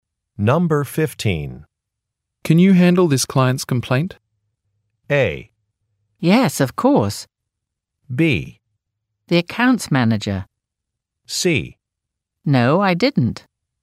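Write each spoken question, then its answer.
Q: Can you handle this client's complaint?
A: A: Yes, of course.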